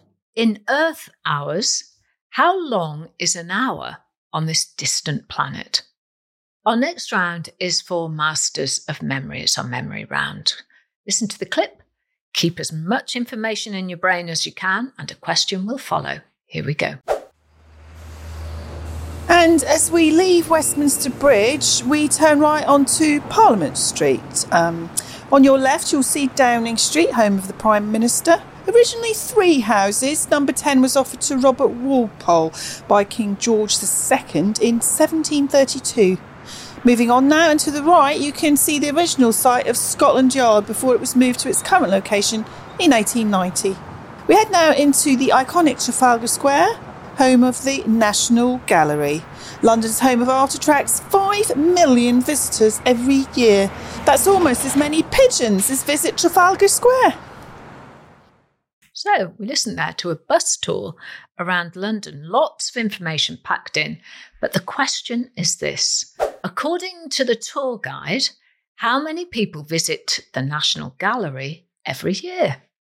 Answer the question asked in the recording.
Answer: And the answer is the National Gallery gets 5 million visitors a year